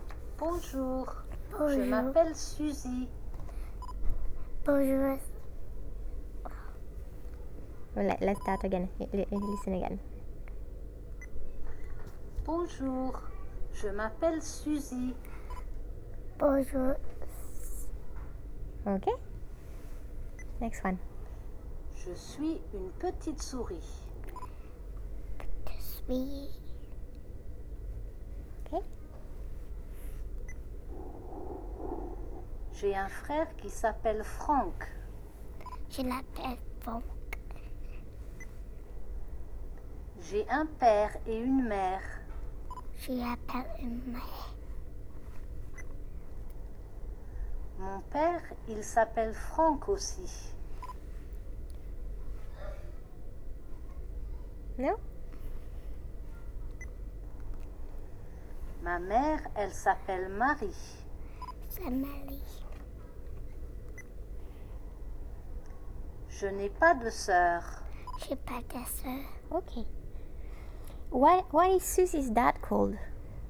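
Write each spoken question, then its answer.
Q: Why is Susie's dad called?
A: Franck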